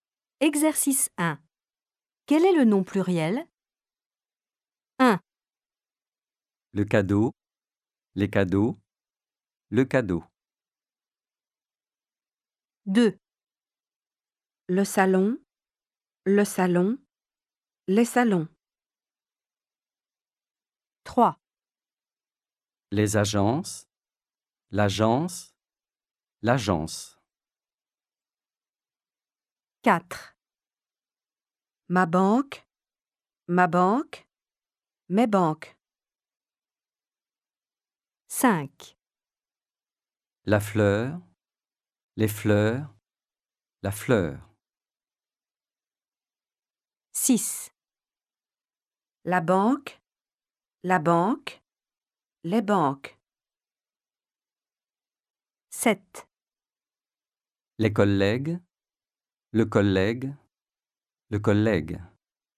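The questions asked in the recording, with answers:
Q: Le cadeau, les cadeaux, le cadeau.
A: les cadeaux

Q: Le salon, les salons.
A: les salons

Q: Les agences, l'agence, l'agence.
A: les agences

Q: Ma banque, mes banques.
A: mes banques

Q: La fleur, les fleurs, la fleur.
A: les fleurs

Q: La banque, les banques.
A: les banques

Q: Les collègues, le collègue, le collègue.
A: les collègues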